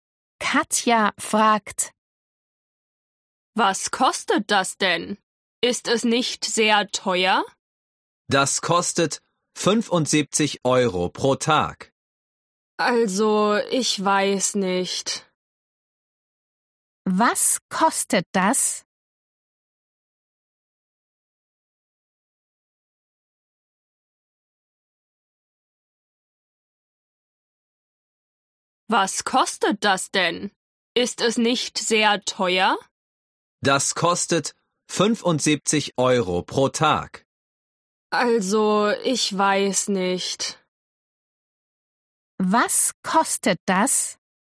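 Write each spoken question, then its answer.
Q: Was kostet das?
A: 75 Euro pro Tag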